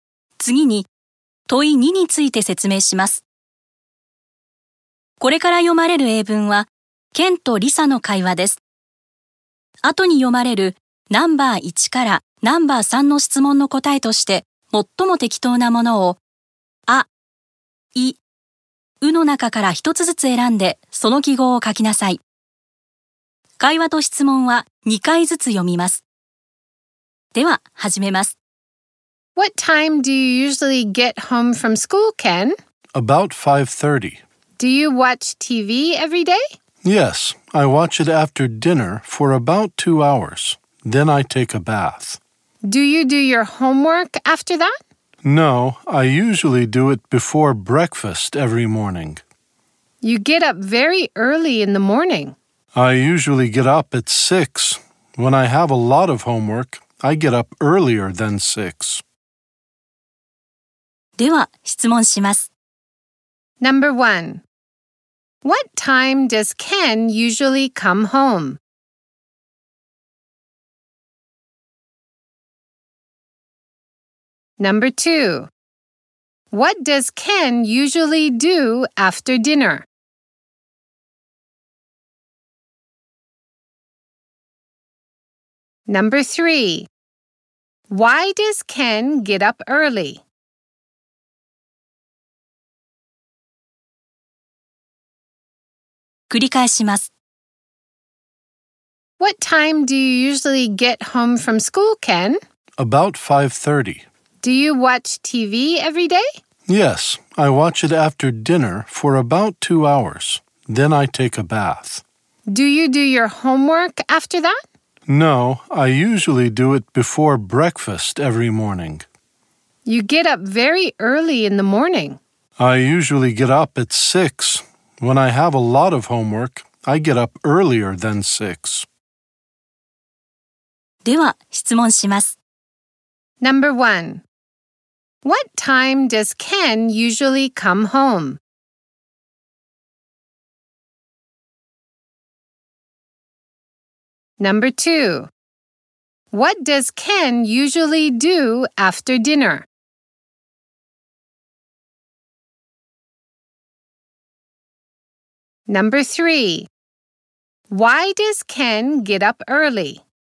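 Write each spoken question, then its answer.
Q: What time does Ken usually come home?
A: About 5:30

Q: What does Ken usually do after dinner?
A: He watches TV for about 2 hours

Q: Why does Ken get up early?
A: To do his homework before breakfast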